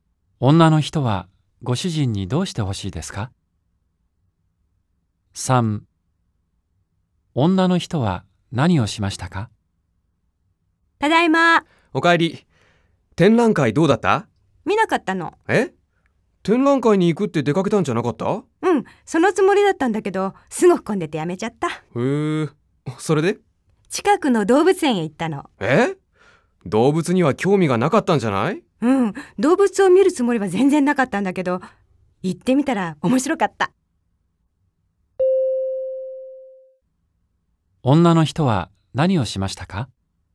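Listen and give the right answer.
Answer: 動物園へ行った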